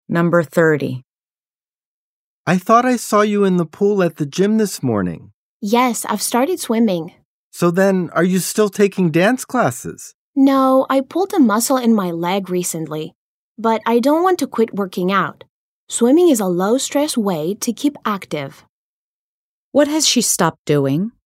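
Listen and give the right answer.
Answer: Taking dance classes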